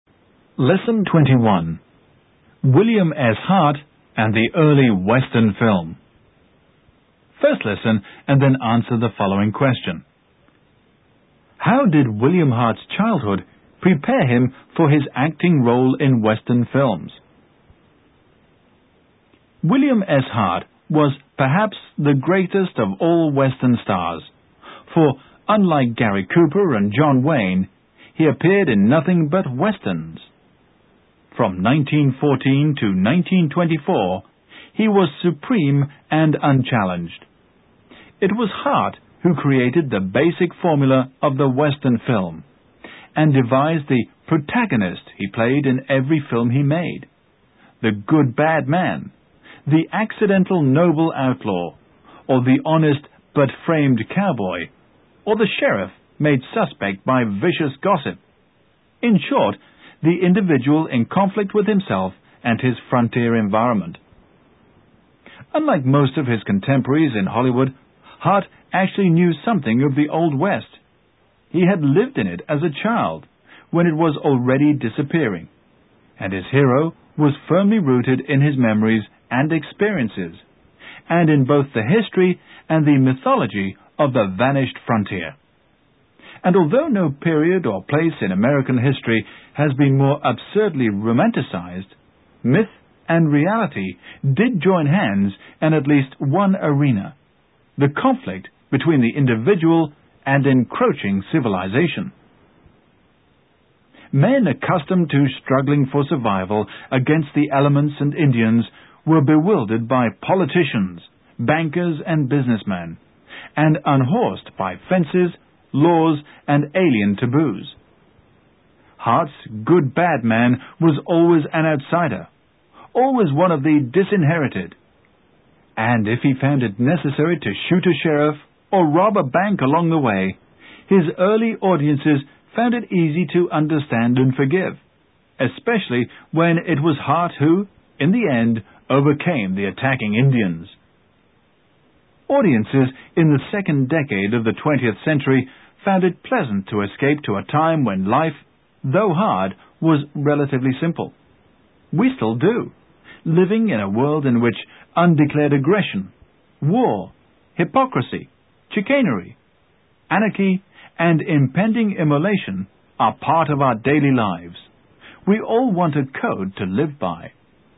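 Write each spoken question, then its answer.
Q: How did William Hart's childhood prepare him for his acting role in Western films?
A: He lived in the Old West as a child, so his hero was rooted in his own memories and experiences of the vanishing frontier.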